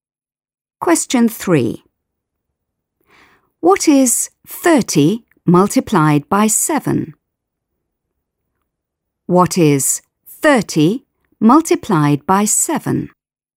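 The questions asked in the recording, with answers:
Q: What is 30 multiplied by 7?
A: 210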